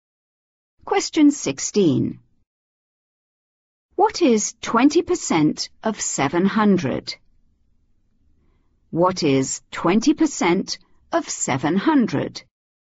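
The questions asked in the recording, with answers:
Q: What is 20% of 700?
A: 140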